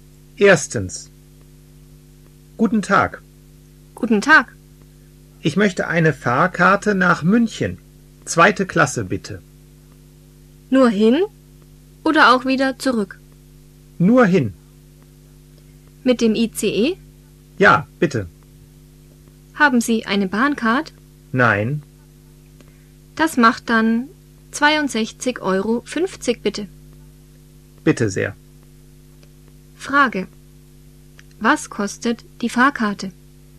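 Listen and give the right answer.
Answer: 62,50 Euro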